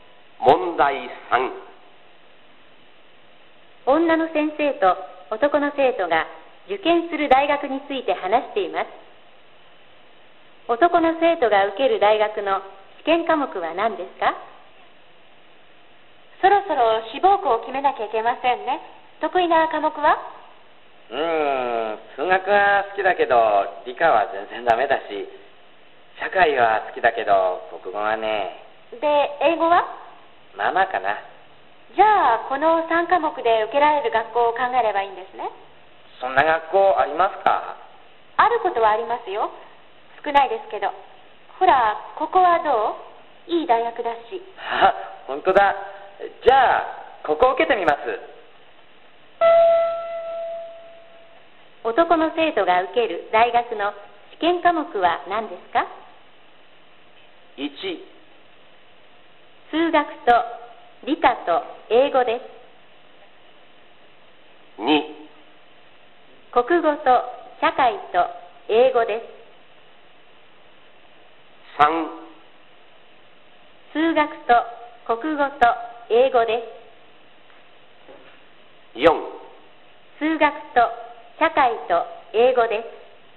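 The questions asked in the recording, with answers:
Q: 男の生徒が受ける大学の試験科目は何ですか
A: 4: 数学と社会と英語です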